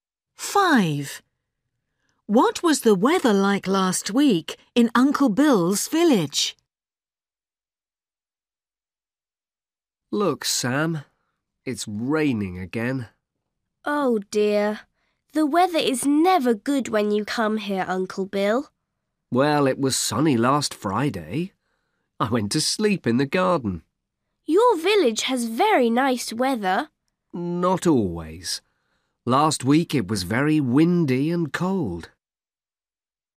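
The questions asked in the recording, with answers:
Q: What was the weather like last week in Uncle Bill's village?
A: Very windy and cold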